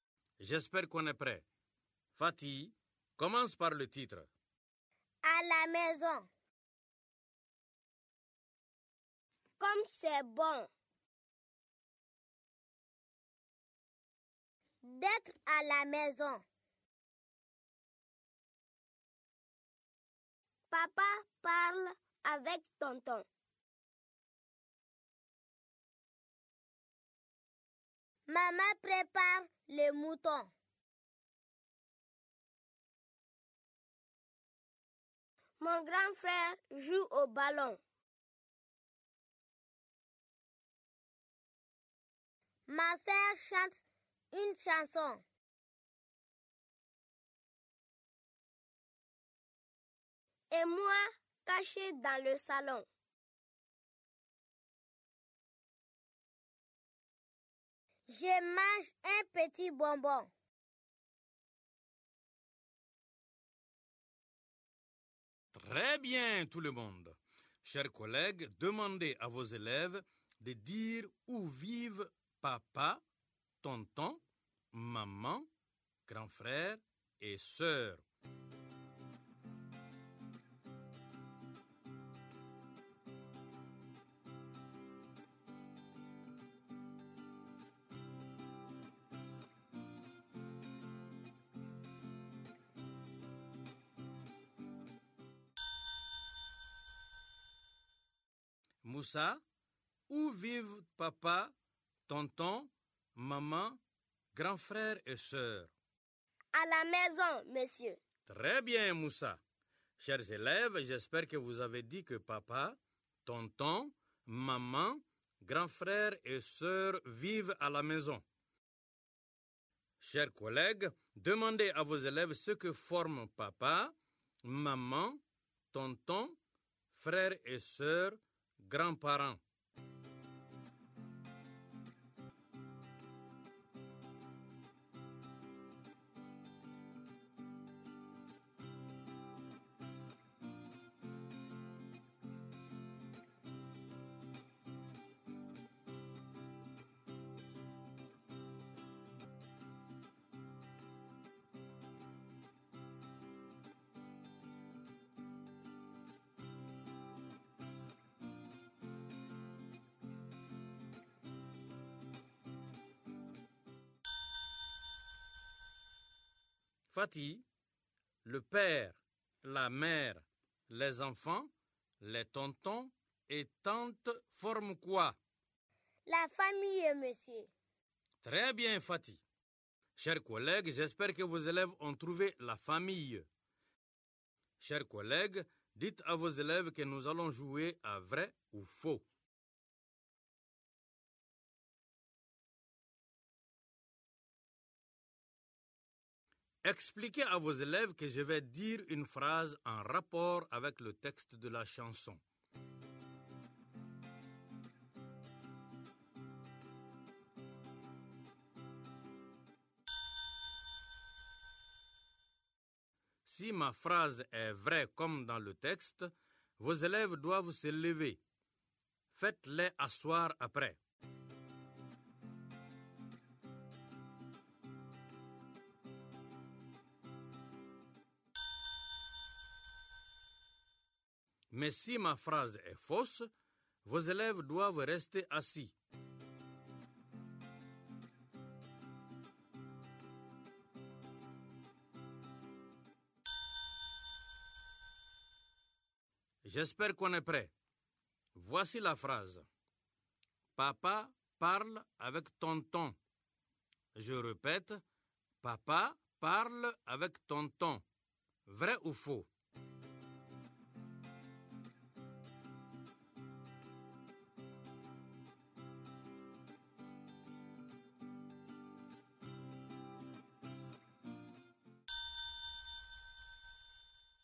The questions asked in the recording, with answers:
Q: Papa parle avec tonton. Je répète, papa parle avec tonton. Vrai ou faux?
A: C'est vrai, monsieur.